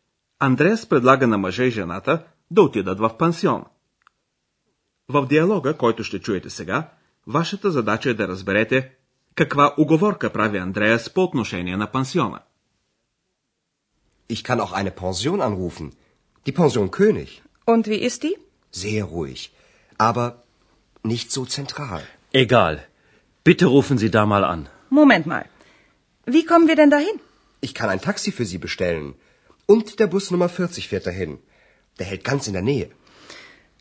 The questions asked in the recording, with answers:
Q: В диалога, който ще чуете сега, вашата задача е да разберете Каква уговорка прави Андреас по отношение на пансиона?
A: Андреас казва за пансиона, че той е много тих, но че не е разположен така централно.